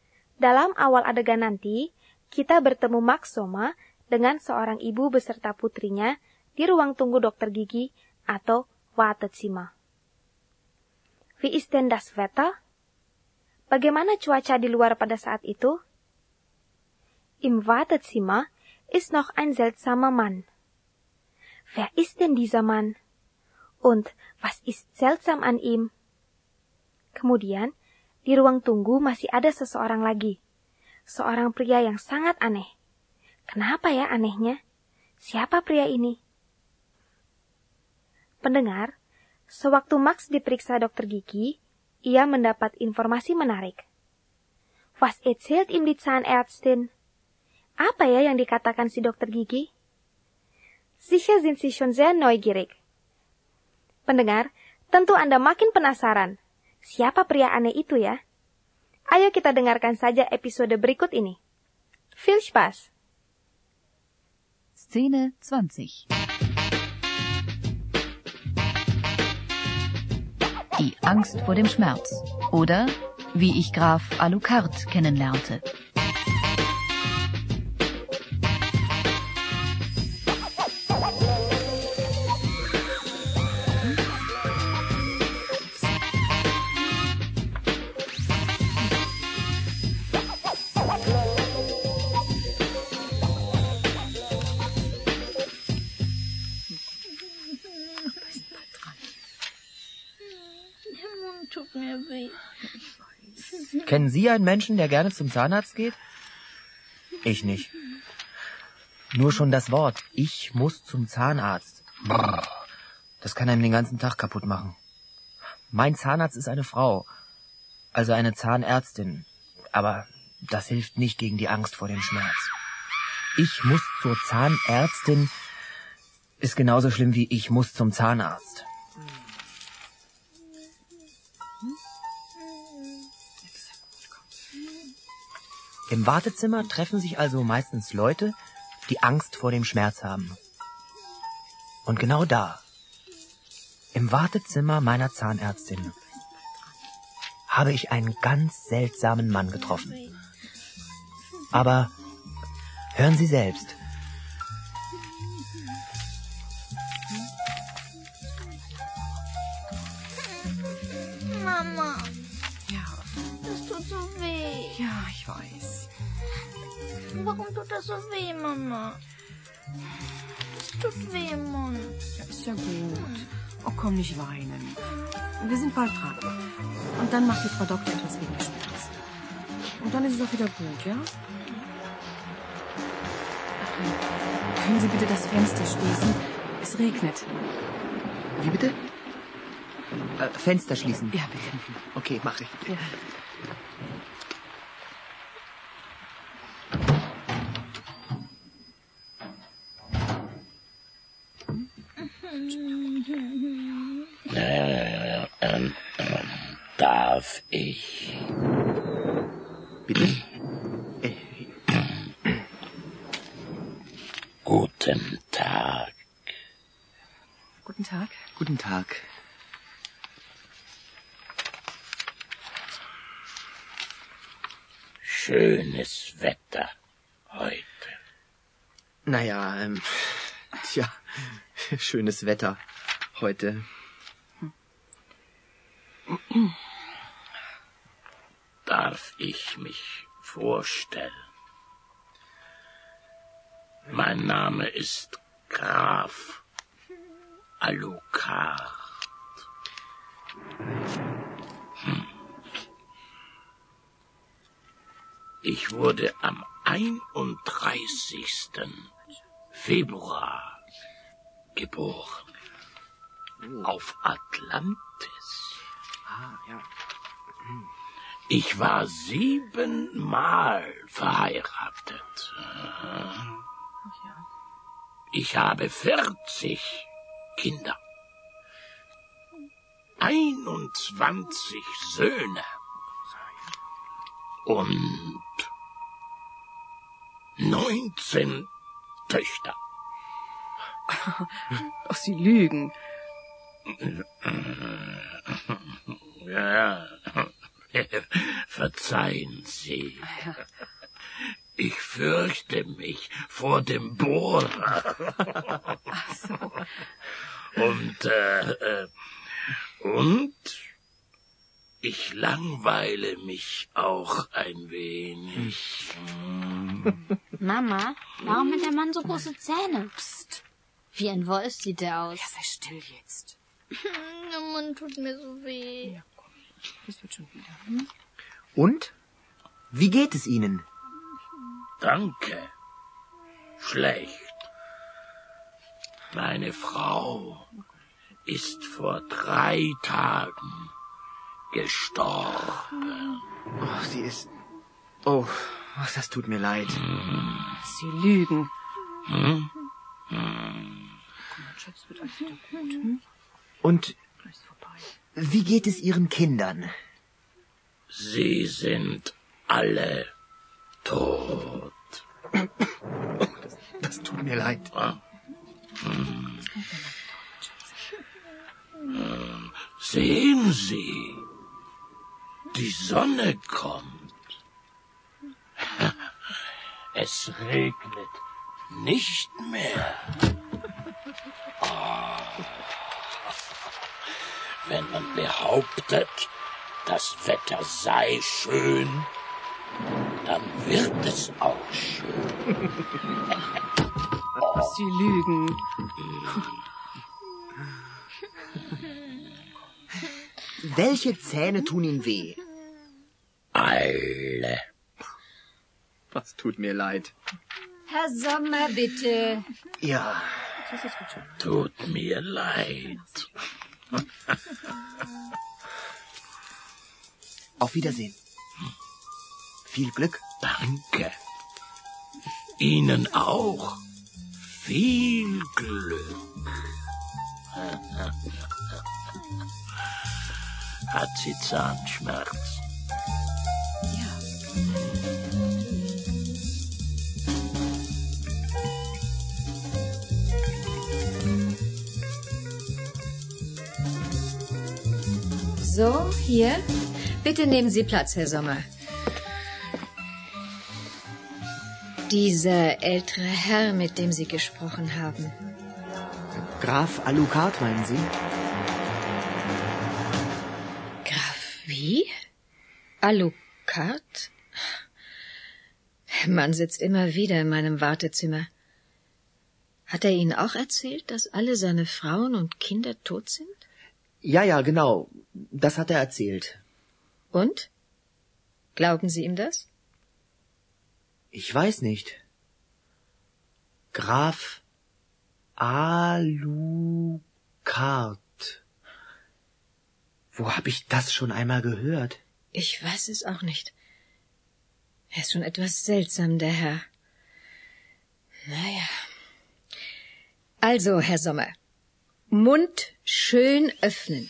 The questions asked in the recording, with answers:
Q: Wie ist denn das Wetter?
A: Es regnet.

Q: Wer ist denn dieser Mann?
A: Dia memperkenalkan diri sebagai Graf Alucard.

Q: Und was ist seltsam an ihm?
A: Anehnya, karena dia mengaku lahir pada tanggal 31 Februari di Atlantis.

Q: Was erzählt ihm die Zahnärztin?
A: Der Mann sitzt oft in ihrem Wartezimmer und erzählt immer die gleichen Geschichten.